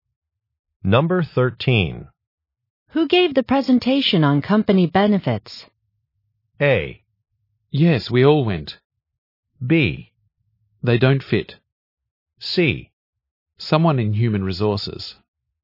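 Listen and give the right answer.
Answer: C: Someone in human resources.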